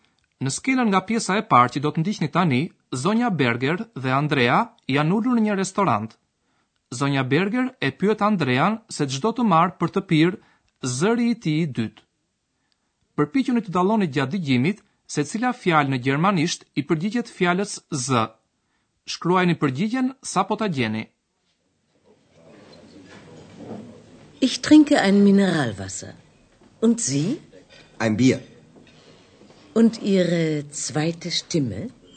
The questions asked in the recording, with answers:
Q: Përpiquni të dalloni gjatë dëgjimit se cila fjalë në gjermanisht i përgjigjet fjalës z.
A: Përgjigjja është shtime.